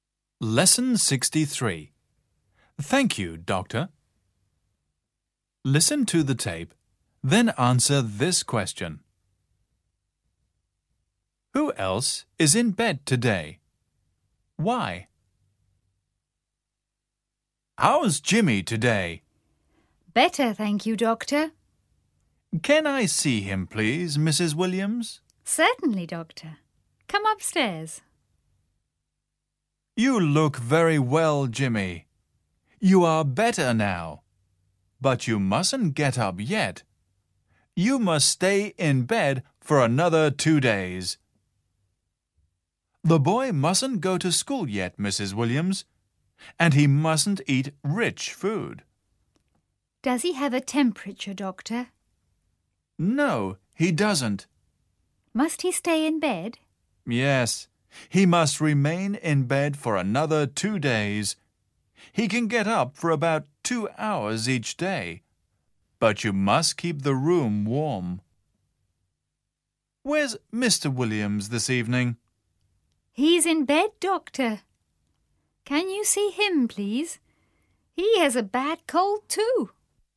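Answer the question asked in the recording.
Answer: Mr. Williams, because he has a bad cold.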